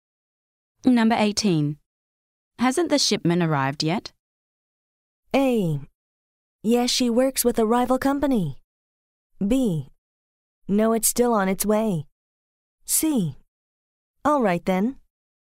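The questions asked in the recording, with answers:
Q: Hasn't the shipment arrived yet?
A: B: No, it's still on its way.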